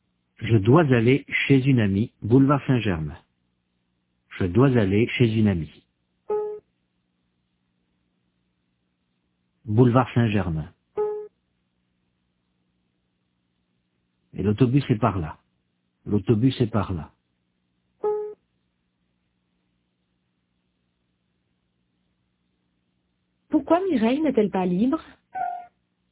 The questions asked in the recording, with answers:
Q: Pourquoi Mireille n'est-elle pas libre?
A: Parce qu'elle doit aller chez une amie.